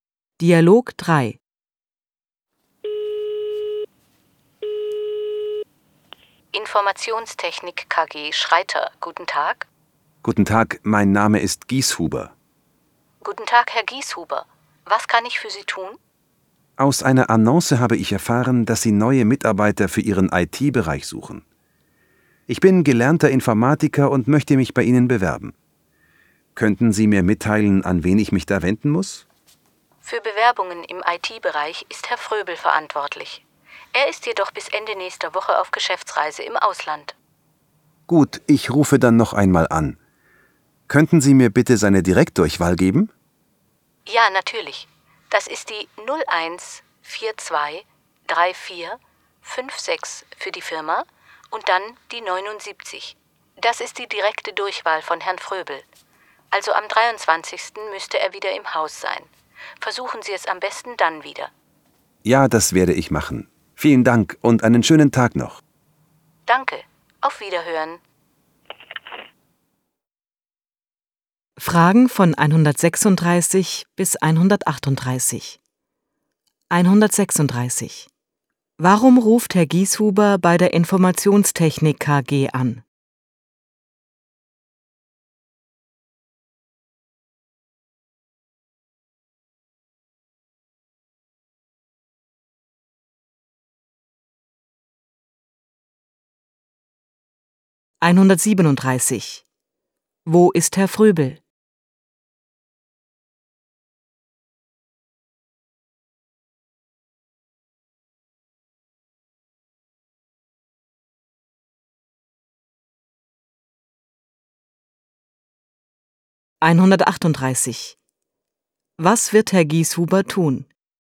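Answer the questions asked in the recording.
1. Er möchte sich als Informatiker bewerben
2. Auf Geschäftsreise im Ausland
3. Am 23. Herrn Fröbel direkt wieder anrufen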